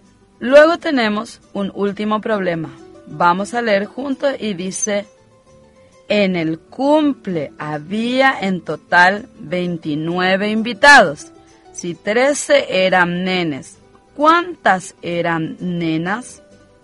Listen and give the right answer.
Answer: participaron del cumpleaños 16 niñas.